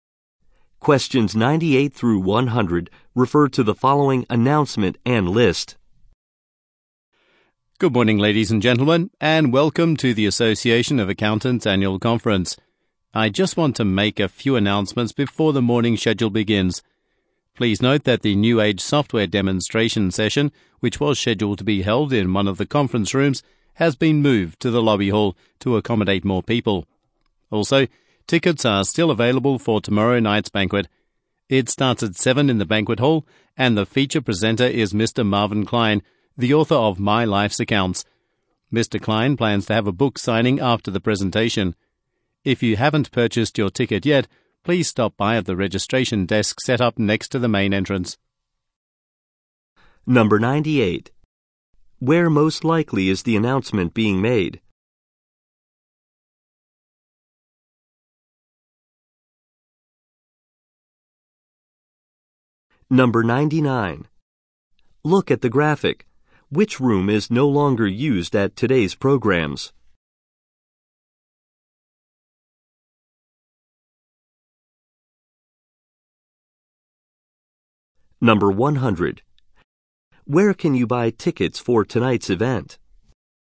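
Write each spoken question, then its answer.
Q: Where most likely is the announcement being made?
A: At an accountants' conference

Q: Where can you buy tickets for tonight's event?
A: At the registration desk next to the main entrance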